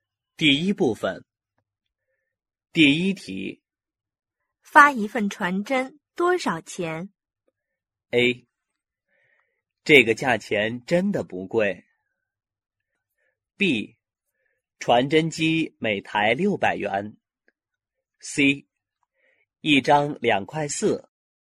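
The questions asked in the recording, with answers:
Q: 发一份传真多少钱?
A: C: 一张2.4元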